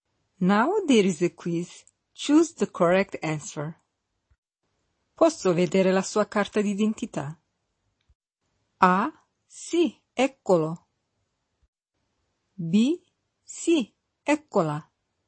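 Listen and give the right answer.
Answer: B: Sì, eccola.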